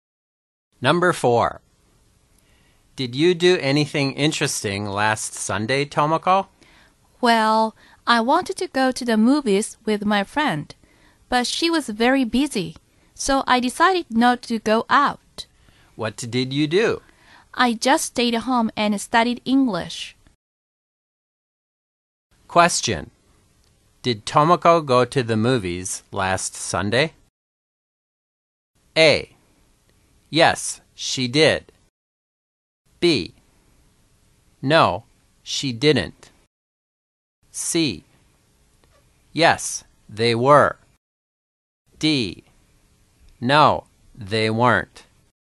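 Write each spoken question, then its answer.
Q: Did Tomoko go to the movies last Sunday?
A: B: No, she didn't.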